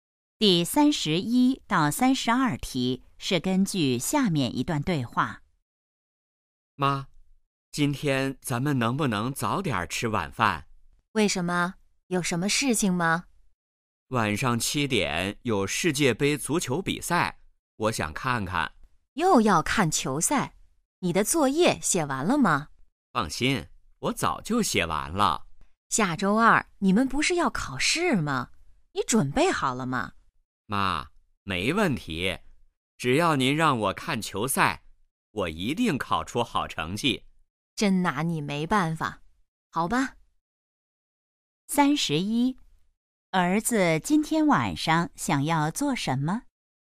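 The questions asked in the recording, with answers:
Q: 儿子今天晚上想要做什么?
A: 看世界杯足球比赛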